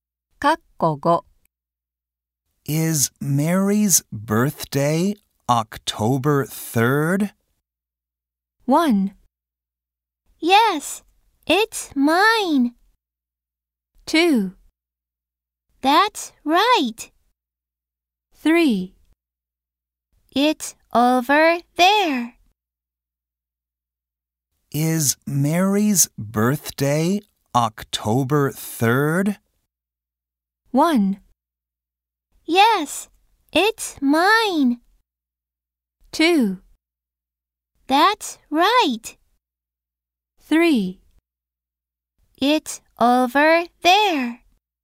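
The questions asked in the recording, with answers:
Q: Is Mary's birthday October 3rd?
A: 2: That's right.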